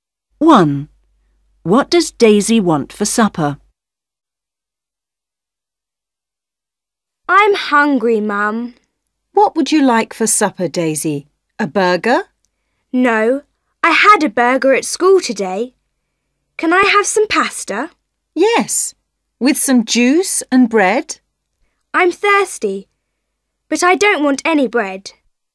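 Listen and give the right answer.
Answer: pasta and juice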